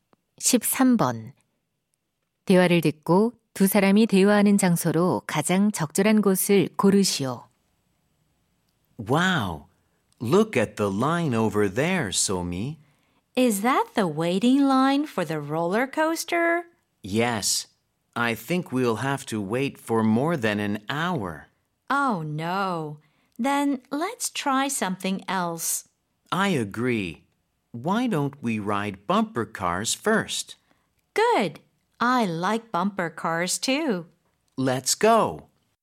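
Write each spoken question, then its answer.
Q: 대화를 듣고 두 사람이 대화하는 장소로 가장 적절한 곳을 고르시오.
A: 놀이공원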